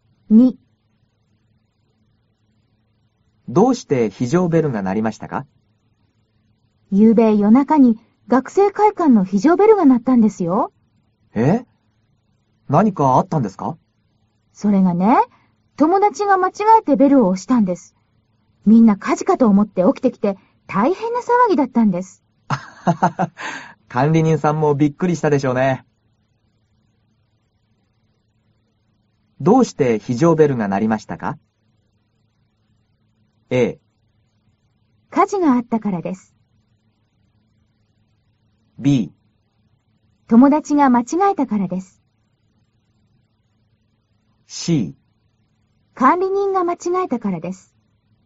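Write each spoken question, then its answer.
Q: どうして非常ベルが鳴りましたか?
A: B: 友達が間違えたからです。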